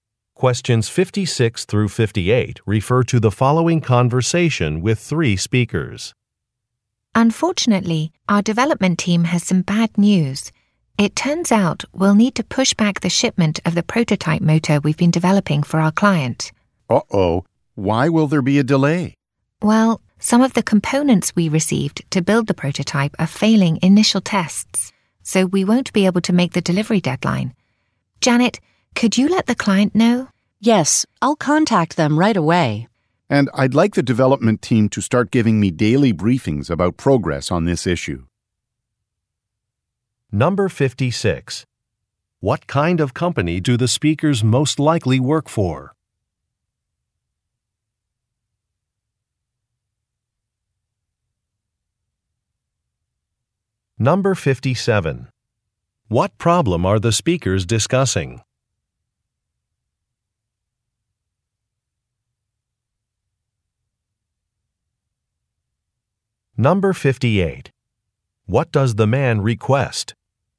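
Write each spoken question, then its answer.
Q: What problem are the speakers discussing?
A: A prototype shipment will be delayed because components failed tests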